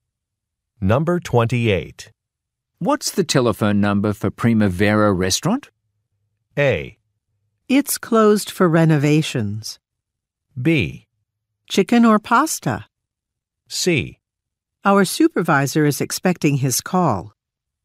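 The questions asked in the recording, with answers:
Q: What's the telephone number for Primavera Restaurant?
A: A: It's closed for renovations.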